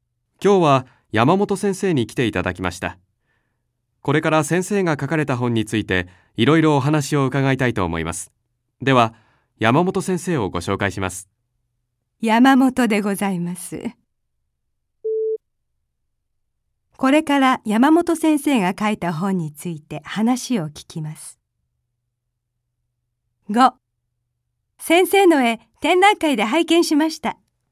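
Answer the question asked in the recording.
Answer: ○(正しい)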